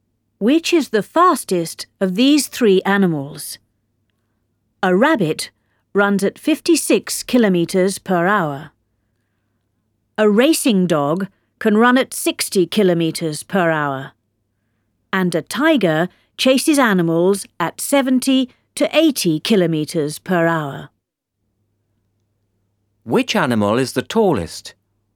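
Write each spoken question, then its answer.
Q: Which is the fastest of these three animals?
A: the tiger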